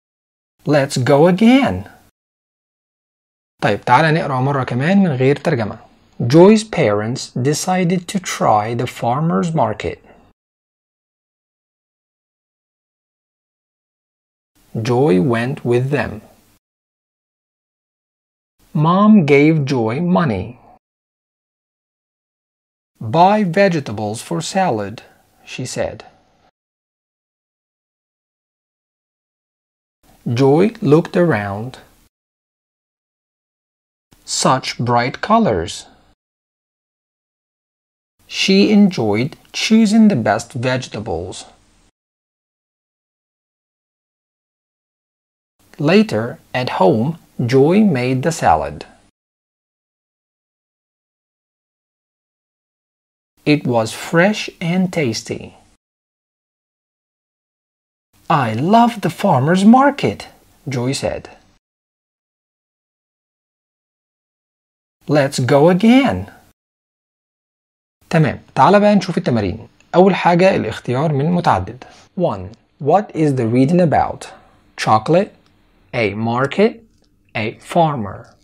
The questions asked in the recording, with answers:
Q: What is the reading about?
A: الإجابة A market.